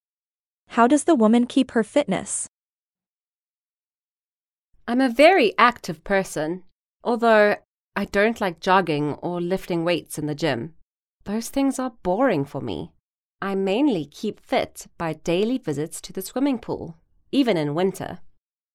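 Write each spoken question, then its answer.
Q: How does the woman keep her fitness?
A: swimming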